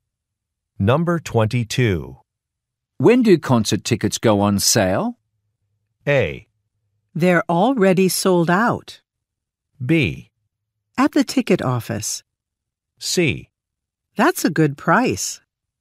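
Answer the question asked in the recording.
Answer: A: They're already sold out.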